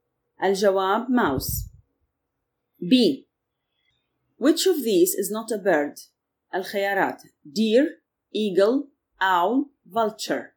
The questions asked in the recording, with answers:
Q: Which of these is not a bird?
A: الجواب deer.